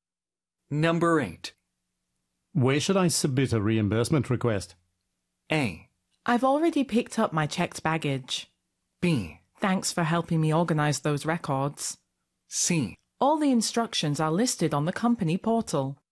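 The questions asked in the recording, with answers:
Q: Where should I submit a reimbursement request?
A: C: All the instructions are listed on the company portal.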